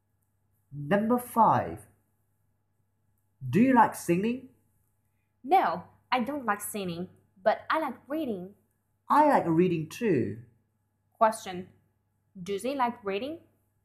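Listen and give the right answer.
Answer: Yes, they do.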